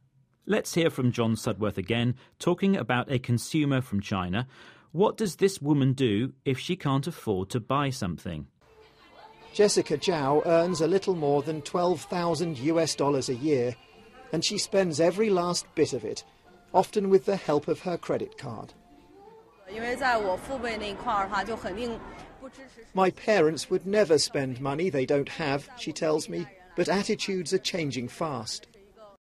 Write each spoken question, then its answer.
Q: What does this woman do if she can't afford to buy something?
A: So that woman uses a credit card.